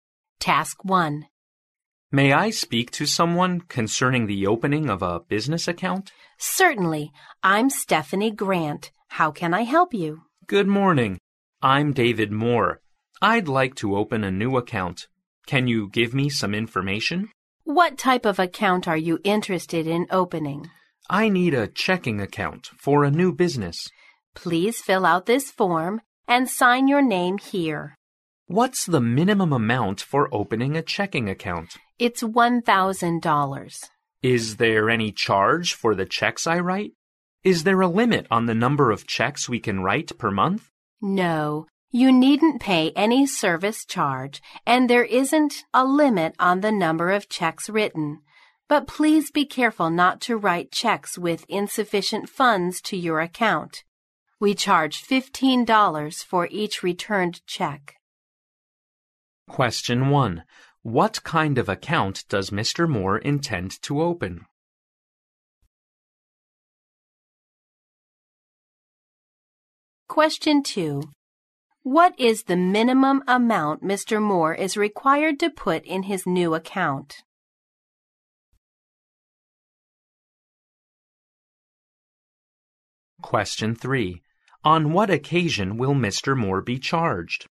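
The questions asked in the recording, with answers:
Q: What kind of account does Mr. Moore intend to open?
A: A checking account for a new business

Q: What is the minimum amount Mr. Moore is required to put in his new account?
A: $1,000

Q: On what occasion will Mr. Moore be charged?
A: When he writes a check with insufficient funds ($15 per returned check)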